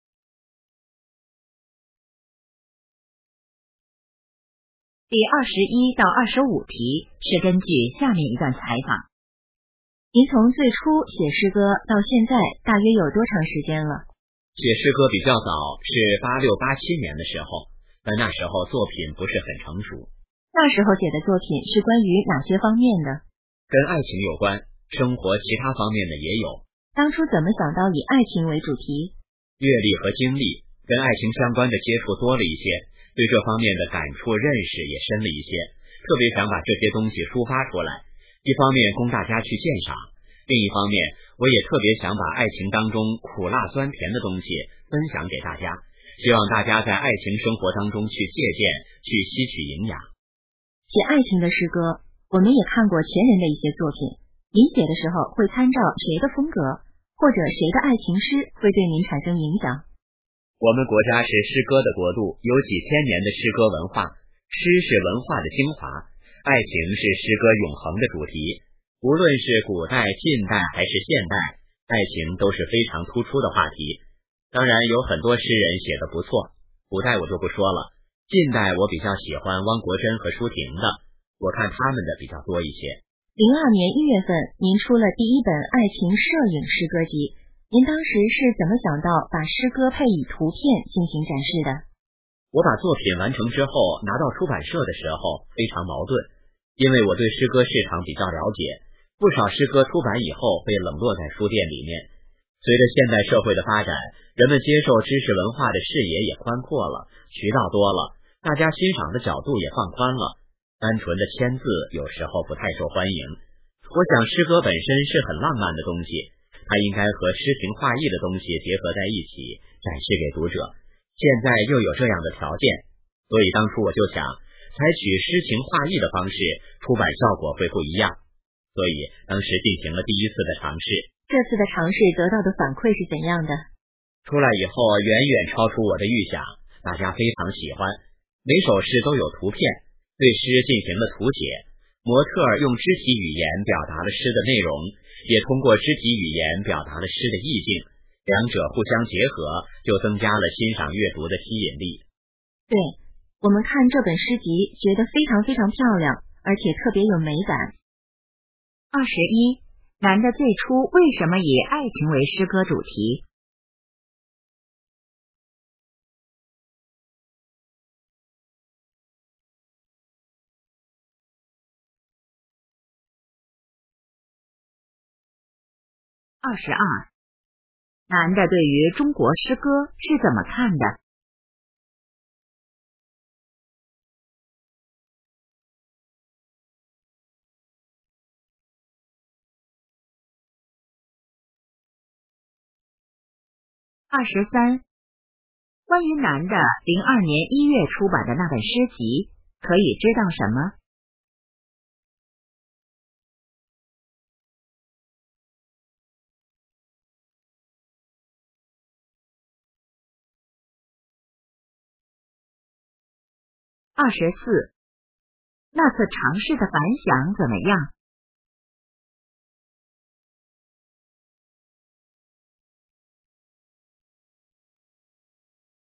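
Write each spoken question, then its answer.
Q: 男的最初为什么以爱情为诗歌主题?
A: 接触爱情多,感触深,想抒发和分享

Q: 男的对于中国诗歌是怎么看的?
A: 中国是诗歌的国度,诗是文化的精华

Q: 关于男的2002年1月出版的那本诗集,可以知道什么?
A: 诗歌配有摄影图片

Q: 那次尝试的反响怎么样?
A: 远超预想,大家非常喜欢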